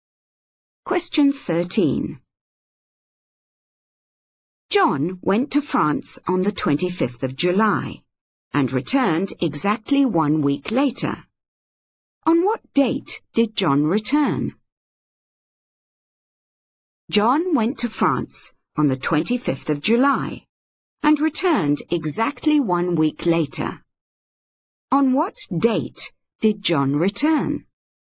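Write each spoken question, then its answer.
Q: On what date did John return?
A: 1st of August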